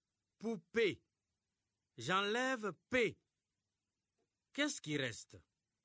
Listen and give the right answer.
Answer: Monsieur, il reste pou.